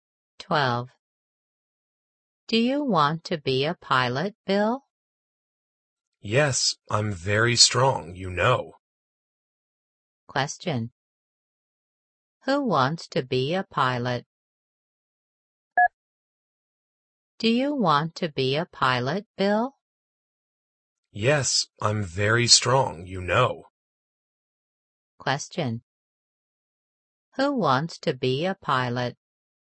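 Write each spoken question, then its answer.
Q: Who wants to be a pilot?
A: Bill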